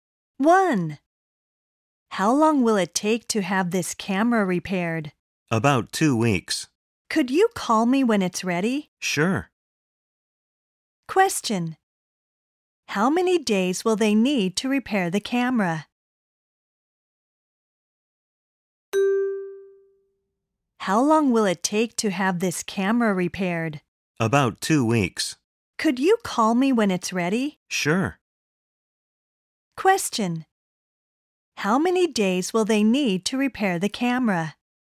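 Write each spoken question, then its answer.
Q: How many days will they need to repair the camera?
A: About 14 days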